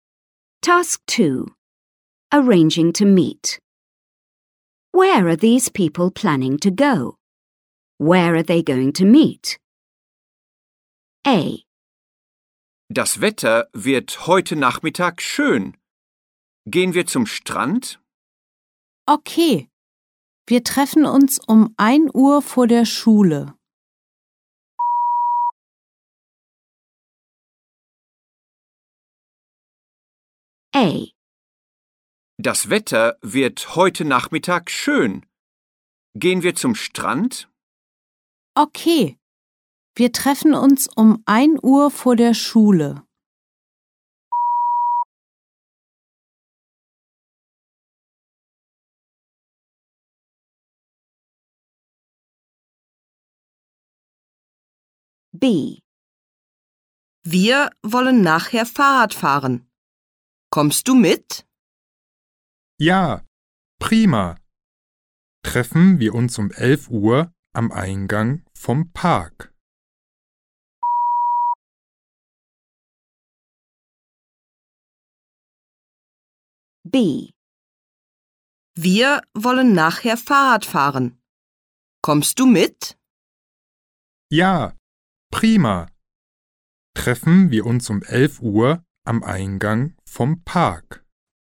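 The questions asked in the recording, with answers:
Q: Where are these people planning to go?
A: To the beach

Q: Where are they going to meet?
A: In front of the school

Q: Where are these people planning to go?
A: Cycling (a bike ride)

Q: Where are they going to meet?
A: At the park entrance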